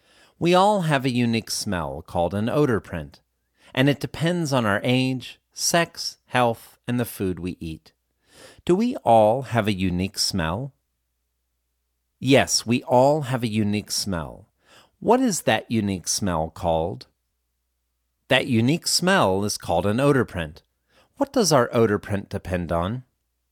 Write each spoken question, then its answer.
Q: What does our odor print depend on?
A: Our odor print depends on our age, sex, health, and the food we eat.